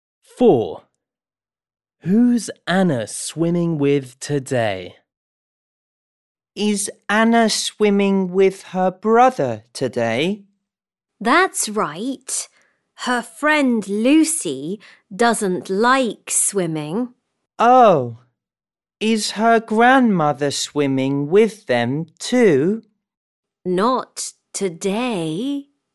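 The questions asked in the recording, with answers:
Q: Who's Anna swimming with today?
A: her brother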